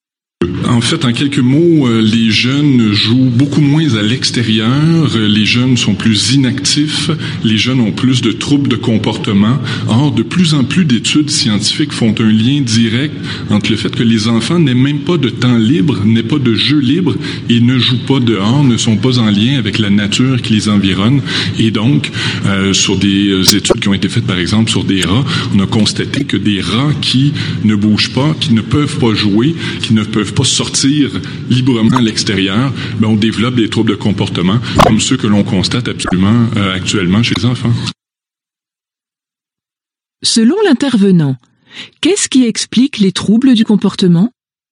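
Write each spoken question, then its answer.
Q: Selon l'intervenant, qu'est-ce qui explique les troubles du comportement?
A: Le manque de jeu libre et d'activité à l'extérieur, le manque de contact avec la nature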